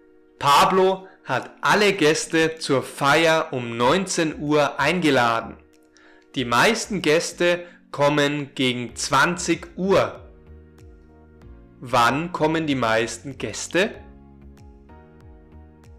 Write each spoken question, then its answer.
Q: Wann kommen die meisten Gäste?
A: Um 20 Uhr. Die meisten Gäste kommen um 20 Uhr.